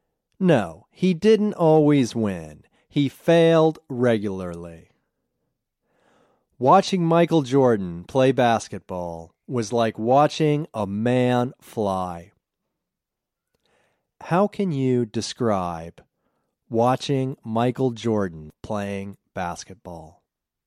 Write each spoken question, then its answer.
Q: How can you describe watching Michael Jordan playing basketball?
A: Watching Michael Jordan play basketball was like watching a man fly.